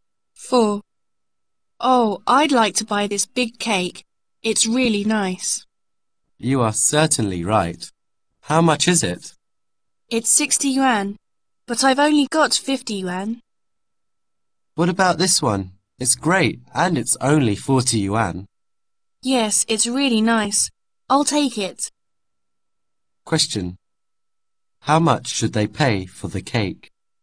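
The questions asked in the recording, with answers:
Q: How much should they pay for the cake?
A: 40 yuan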